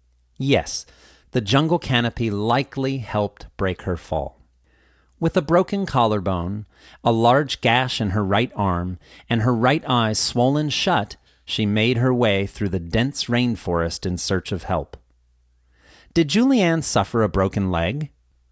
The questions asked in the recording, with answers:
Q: Did Julianne suffer a broken leg?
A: No, she suffered a broken collarbone.